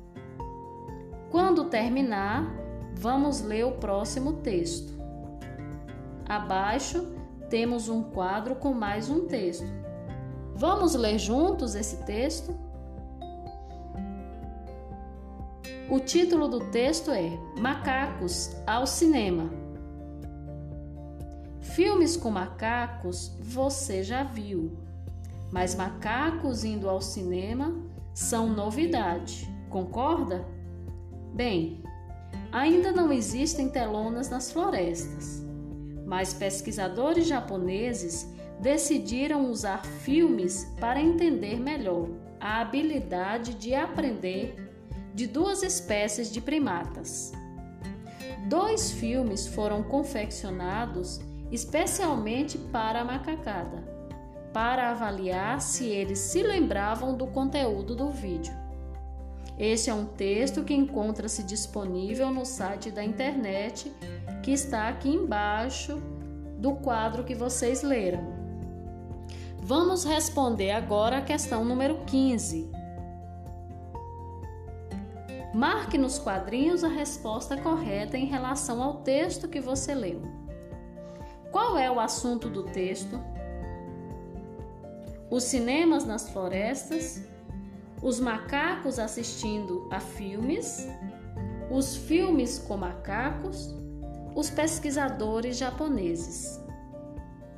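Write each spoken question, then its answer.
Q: Qual é o assunto do texto?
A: B: os macacos assistindo a filmes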